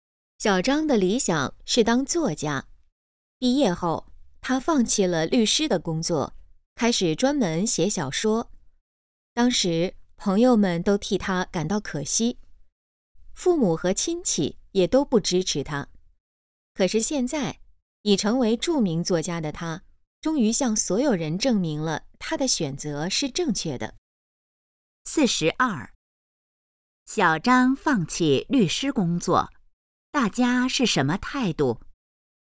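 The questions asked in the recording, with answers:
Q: 小张放弃律师工作,大家是什么态度?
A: 觉得可惜,不支持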